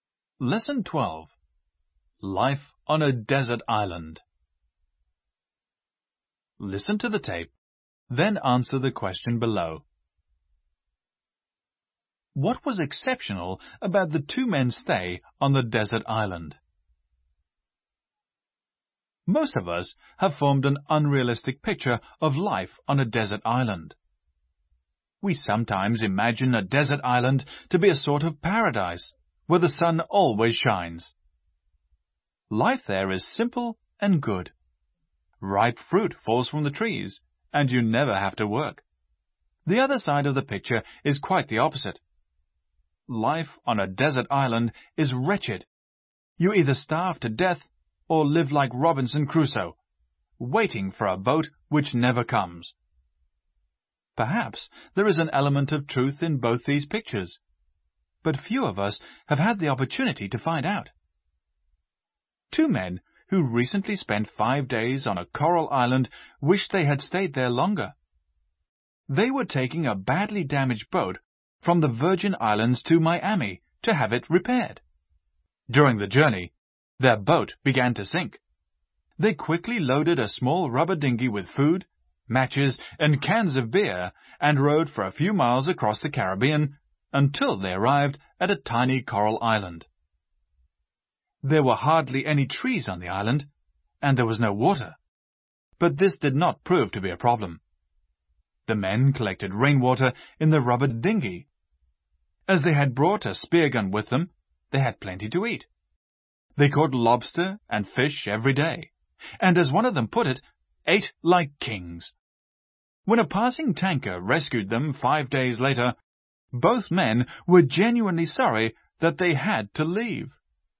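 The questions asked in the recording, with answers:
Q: What was exceptional about the two men's stay on the desert island?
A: They enjoyed it and wished they had stayed longer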